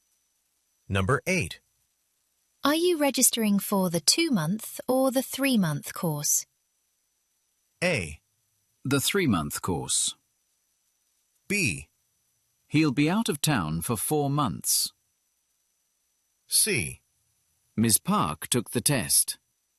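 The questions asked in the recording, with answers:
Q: Are you registering for the 2-month or the 3-month course?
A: A: The 3-month course.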